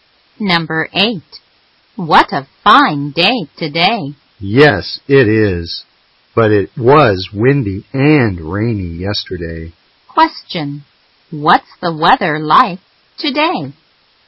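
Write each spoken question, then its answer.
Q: Question. What's the weather like today?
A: Fine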